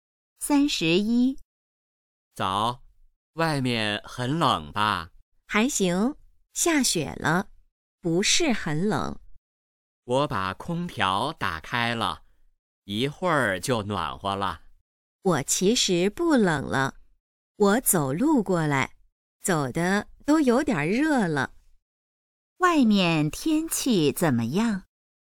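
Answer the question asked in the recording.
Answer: 下雪了,不是很冷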